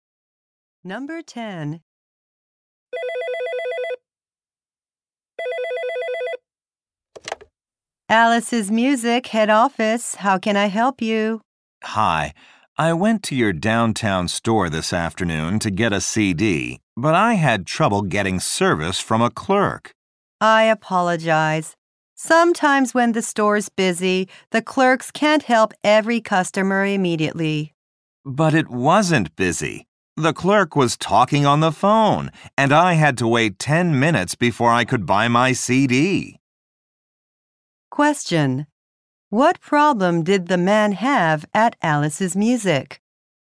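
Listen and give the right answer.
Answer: He had to wait 10 minutes because the clerk was on the phone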